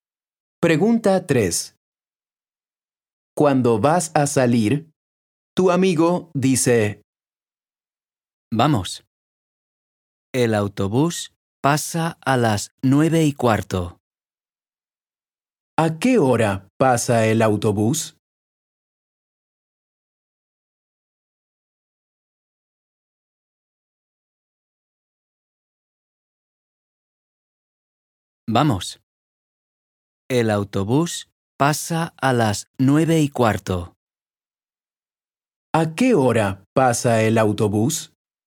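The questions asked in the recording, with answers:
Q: ¿A qué hora pasa el autobús?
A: a las 9:15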